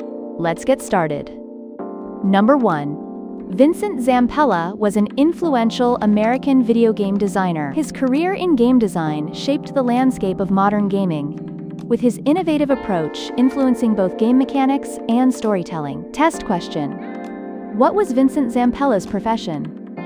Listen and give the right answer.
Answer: Video game designer.